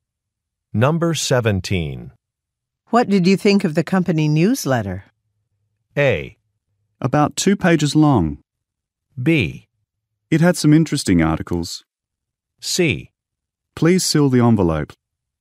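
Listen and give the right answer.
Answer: B: It had some interesting articles.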